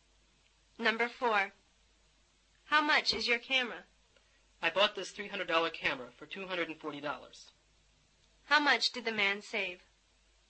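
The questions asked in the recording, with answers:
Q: How much did the man save?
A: $60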